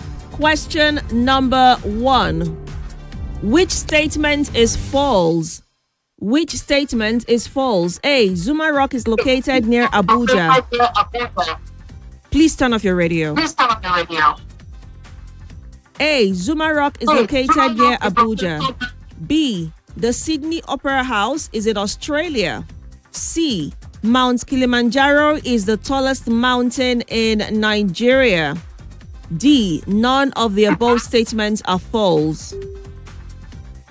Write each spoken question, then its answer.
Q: Which statement is false?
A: If you had said C, you would have been correct.